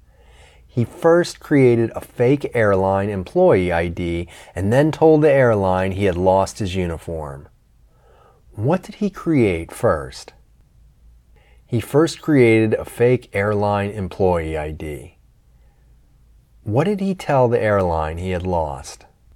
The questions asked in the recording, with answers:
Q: What did he create first?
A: He first created a fake airline employee ID.

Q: What did he tell the airline he had lost?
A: He told the airline he had lost his uniform.